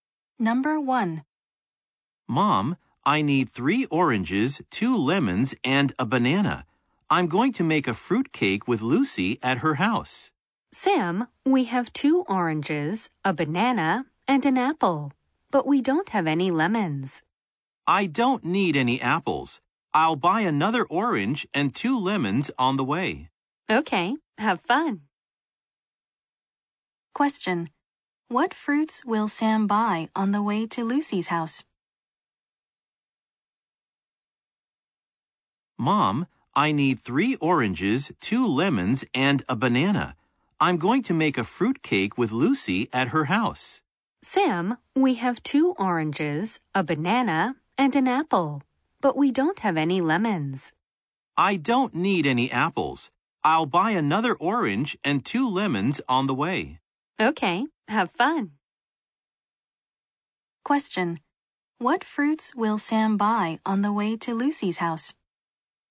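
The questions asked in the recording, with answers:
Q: What fruits will Sam buy on the way to Lucy's house?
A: An orange and two lemons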